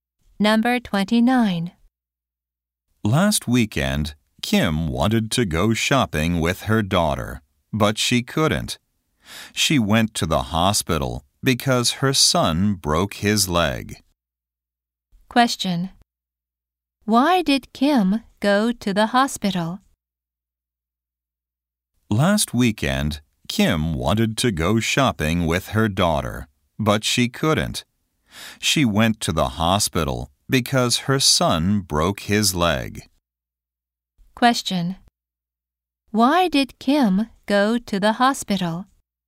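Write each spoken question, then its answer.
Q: Why did Kim go to the hospital?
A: Her son broke his leg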